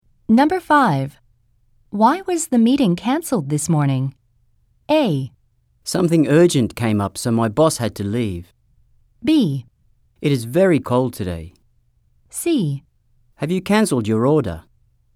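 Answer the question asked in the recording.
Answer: A: Something urgent came up, so my boss had to leave.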